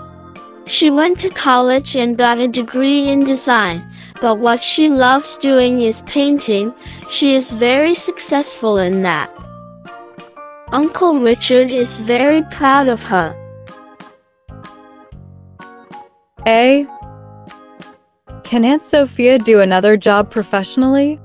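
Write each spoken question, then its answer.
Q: Can Aunt Sophia do another job professionally?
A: Yes, she has a degree in design.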